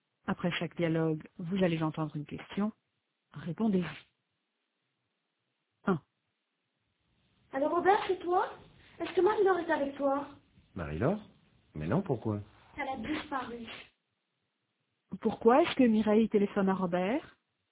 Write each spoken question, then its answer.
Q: Pourquoi est-ce que Mireille téléphone à Robert ?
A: Parce que Marie-Laure a disparu.